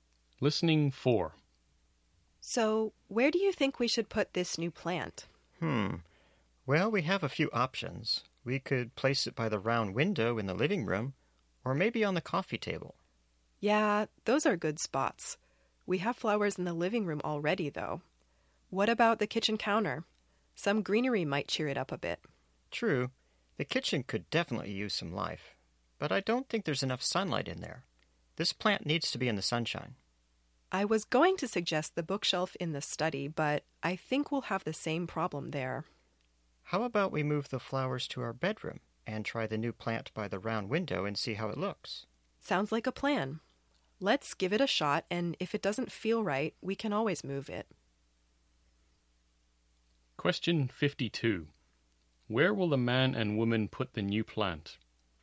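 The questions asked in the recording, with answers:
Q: Where will the man and woman put the new plant?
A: By the round window in the living room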